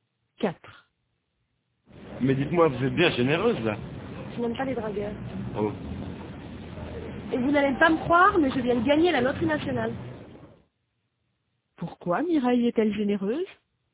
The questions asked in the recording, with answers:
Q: Pourquoi Mireille est-elle généreuse?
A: Parce qu'elle vient de gagner à la loterie nationale.